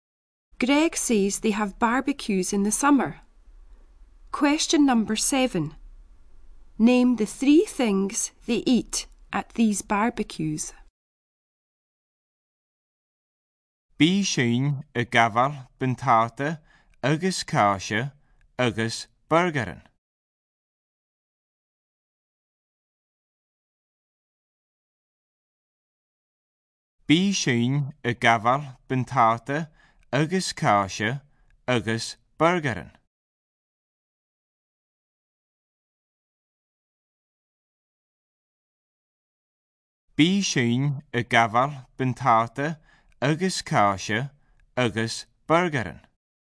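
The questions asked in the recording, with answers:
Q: Name the three things they eat at these barbecues.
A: Potatoes, cheese and burgers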